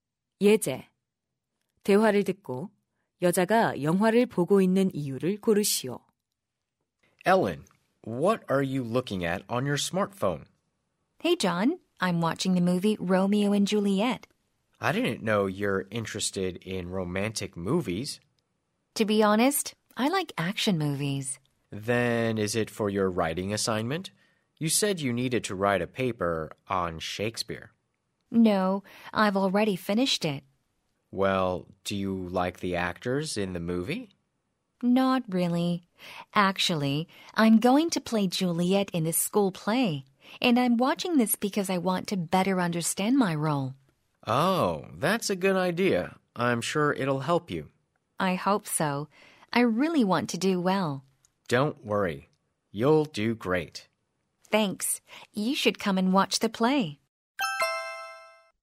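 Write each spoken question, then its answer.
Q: 대화를 듣고 여자가 영화를 보고 있는 이유를 고르시오.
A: 학교 연극에서 줄리엣 역을 맡아 역할을 더 잘 이해하기 위해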